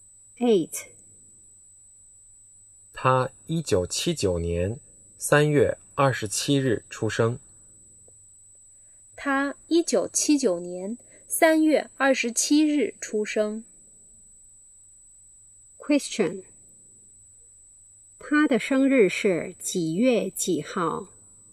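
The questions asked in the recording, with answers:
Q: 他的生日是几月几号?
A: 3月27号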